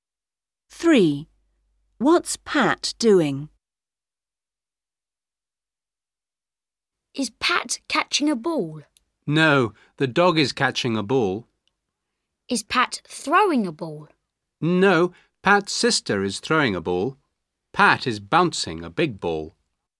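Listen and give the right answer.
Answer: Bouncing a big ball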